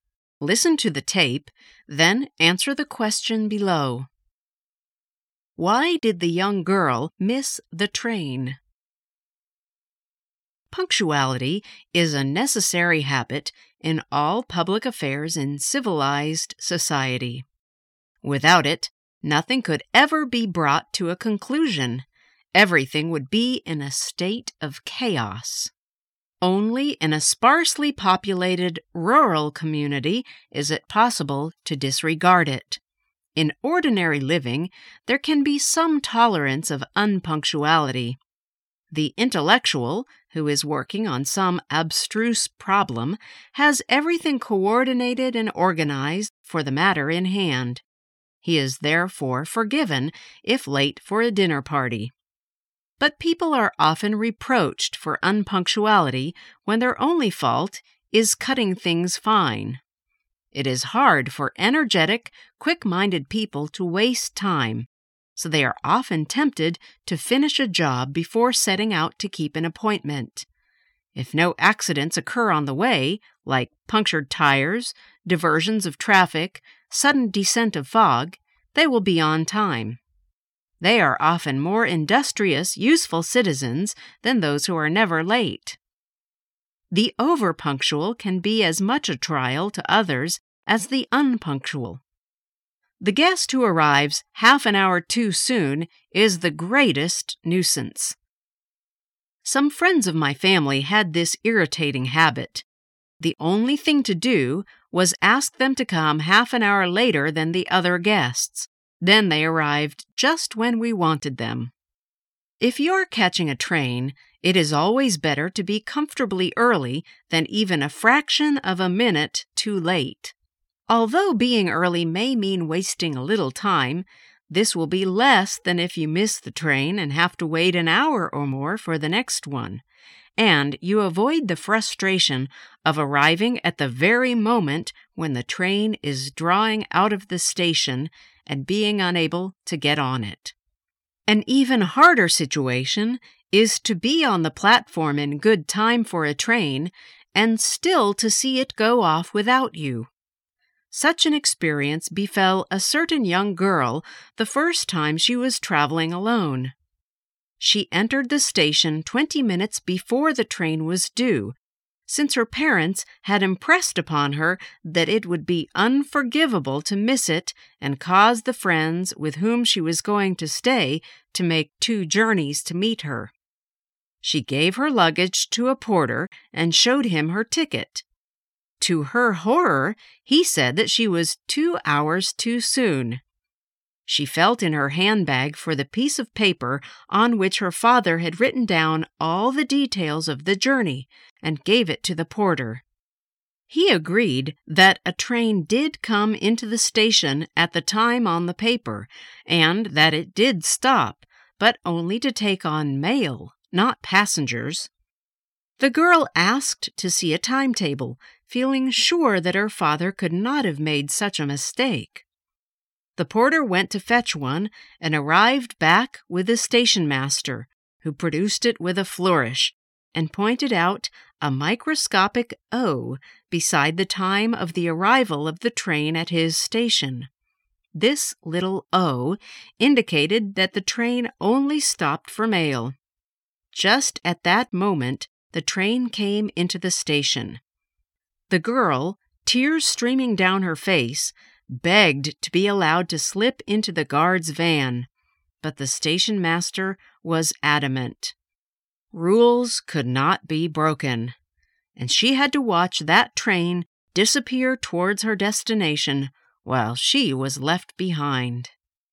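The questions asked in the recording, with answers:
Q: Why did the young girl miss the train?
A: The train only stopped there for mail, not passengers, so she wasn't allowed to board it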